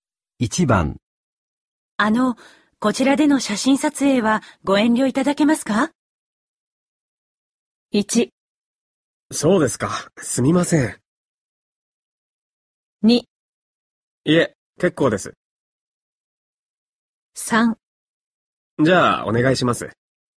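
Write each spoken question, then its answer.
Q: あの、こちらでの写真撮影はご遠慮いただけますか?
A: 1: そうですか、すみません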